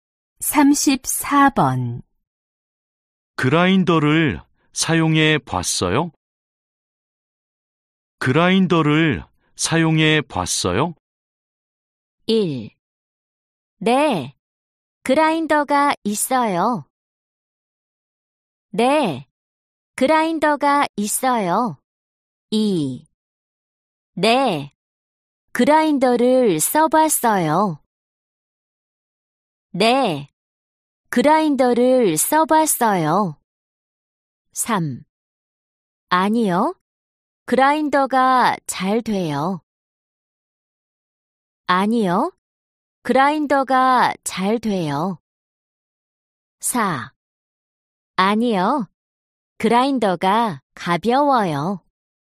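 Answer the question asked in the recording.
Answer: 2: 네, 그라인더를 써봤어요.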